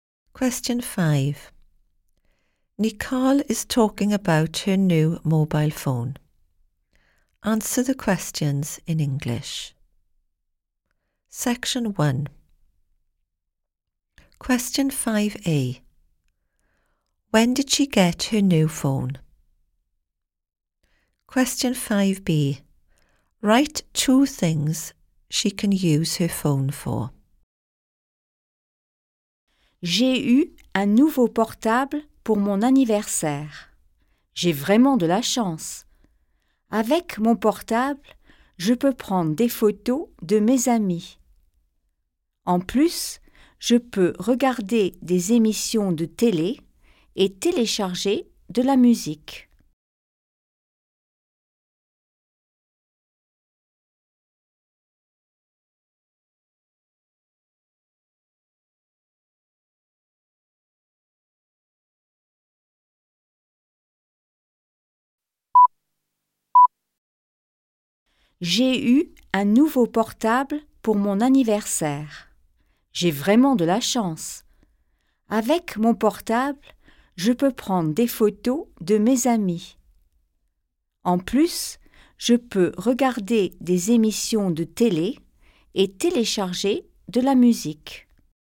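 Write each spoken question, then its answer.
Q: When did she get her new phone?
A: For her birthday

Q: Write two things she can use her phone for.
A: Taking photos of friends; watching TV programmes; downloading music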